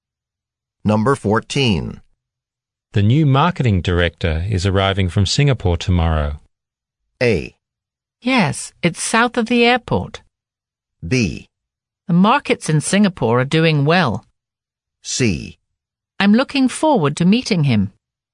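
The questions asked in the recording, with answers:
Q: The new marketing director is arriving from Singapore tomorrow.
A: C: I'm looking forward to meeting him.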